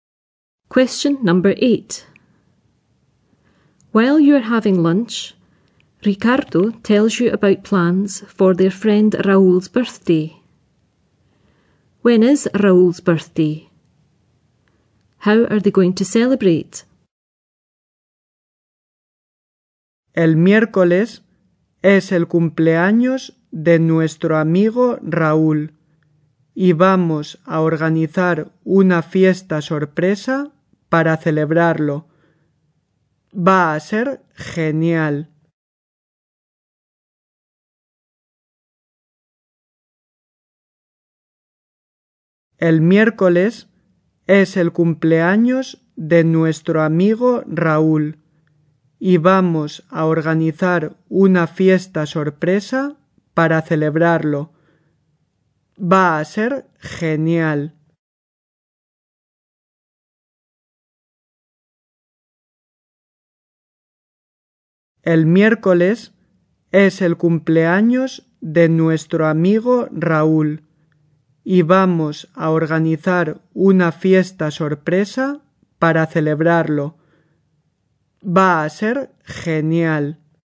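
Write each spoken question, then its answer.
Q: When is Raúl's birthday?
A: Wednesday

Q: How are they going to celebrate?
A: A surprise party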